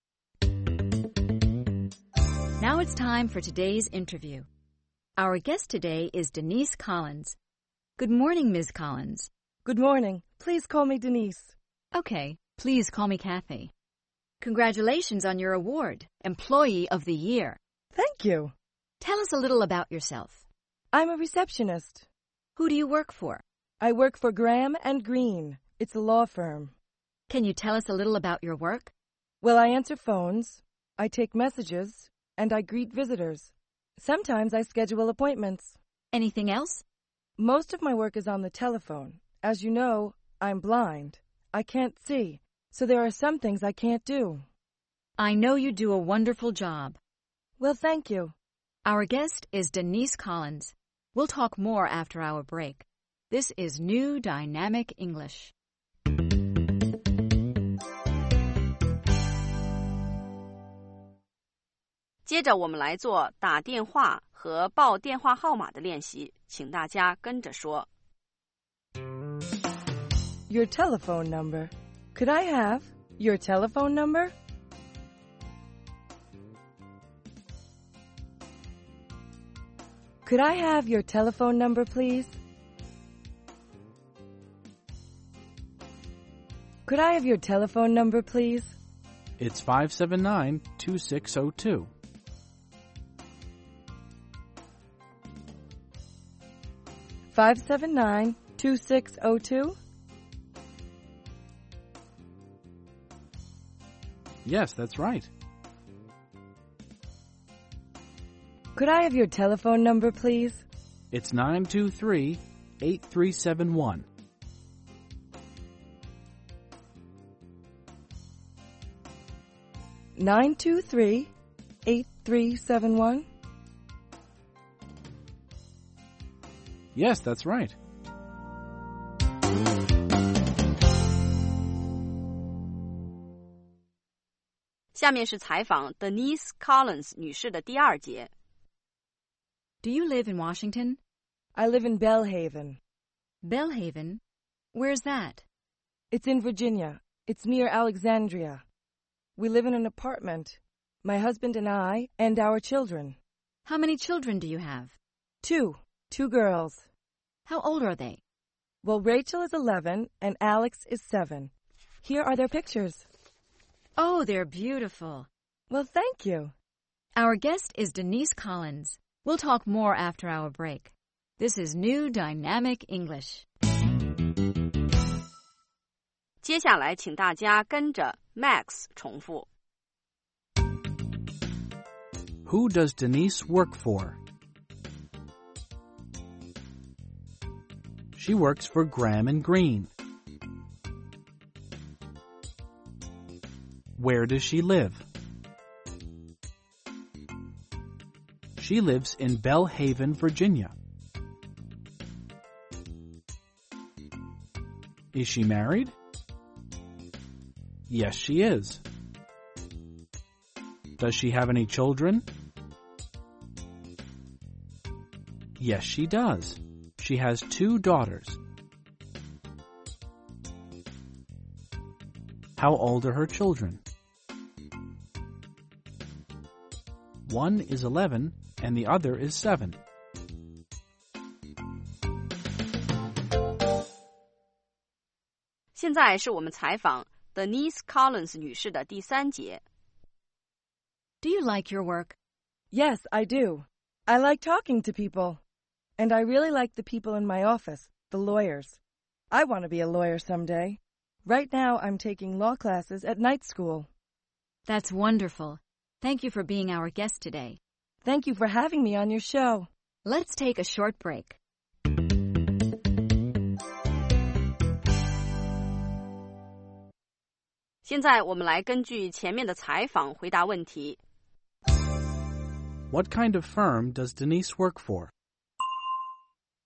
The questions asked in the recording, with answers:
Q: kind of firm does Denise work for?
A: She works for a law firm.